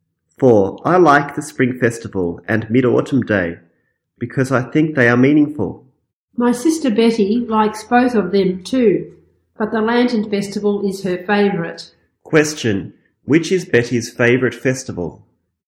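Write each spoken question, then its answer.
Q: Which is Betty's favourite festival?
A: The Lantern Festival.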